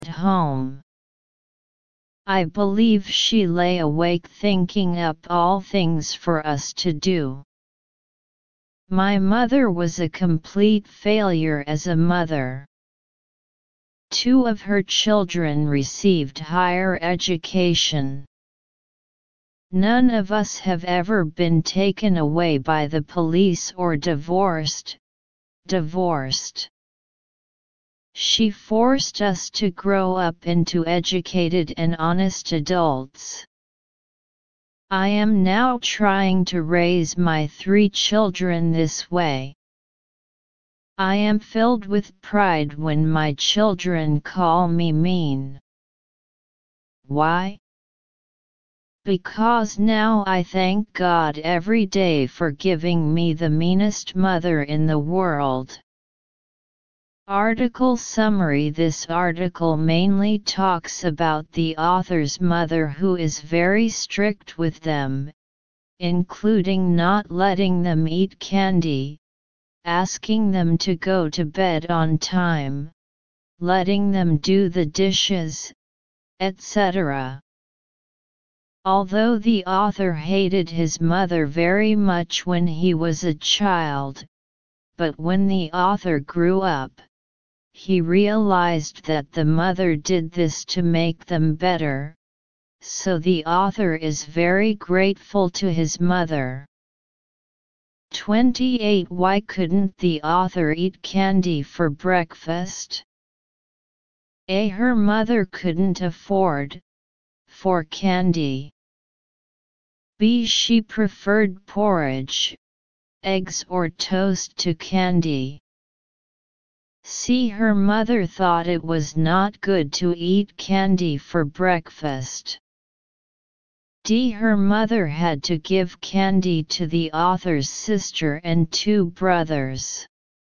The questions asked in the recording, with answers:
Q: Why couldn't the author eat candy for breakfast?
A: Analysis. Choose C.